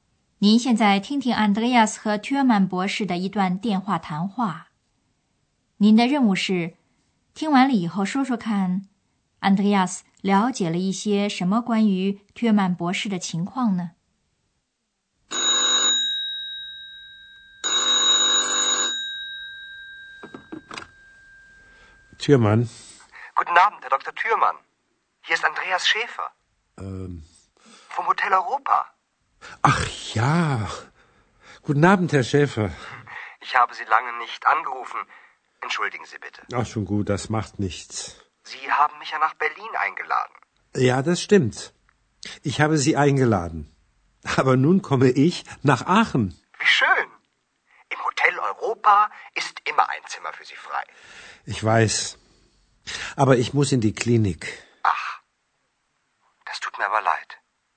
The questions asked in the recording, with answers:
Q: 您的任务是听完了以后说说看 Andreas 了解了一些什么关于 Thürmann 博士的情况呢?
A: Andreas 得知了两件事。第一件是 Thürmann 博士要到亚琛来。 第二件是 Thürmann 博士得进医院。